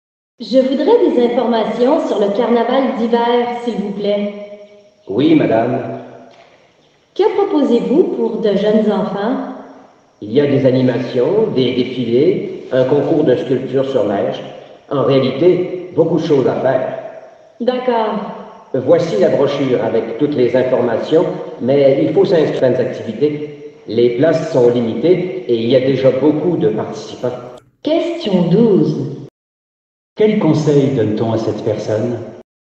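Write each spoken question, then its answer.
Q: Quel conseil donne-t-on à cette personne?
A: De s'inscrire rapidement aux activités, car les places sont limitées.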